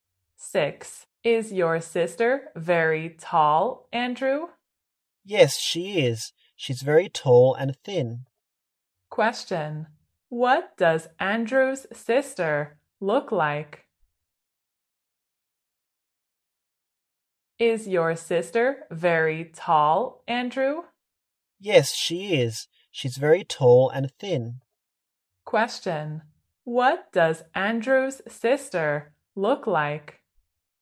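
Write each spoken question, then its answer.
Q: What does Andrew's sister look like?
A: Very tall and thin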